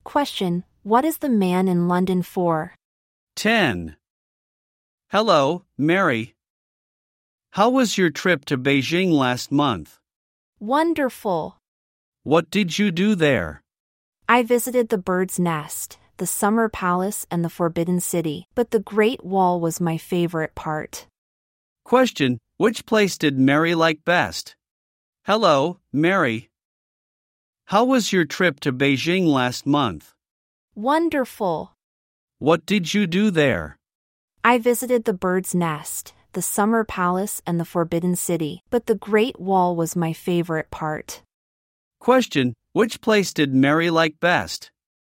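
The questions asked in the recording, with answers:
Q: Question, which place did Mary like best?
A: The Great Wall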